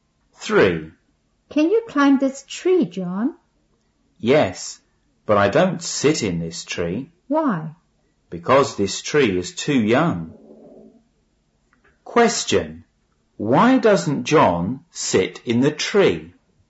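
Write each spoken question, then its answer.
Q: Question. Why doesn't John sit in the tree?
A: Because the tree is too young.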